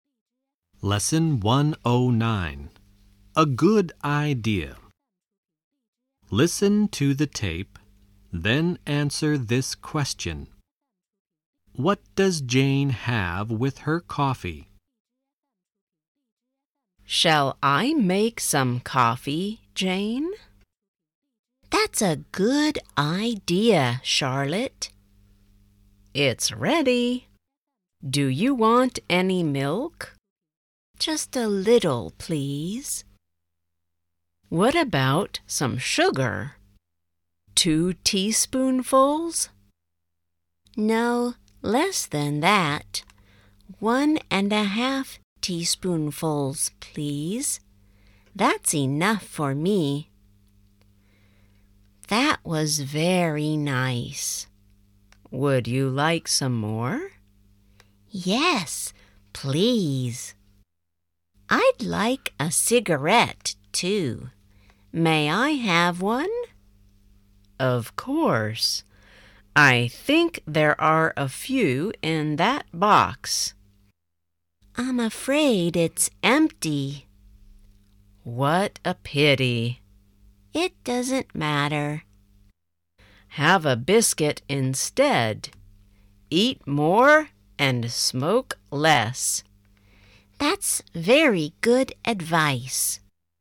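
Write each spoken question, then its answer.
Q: What does Jane have with her coffee?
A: A little milk and one and a half teaspoonfuls of sugar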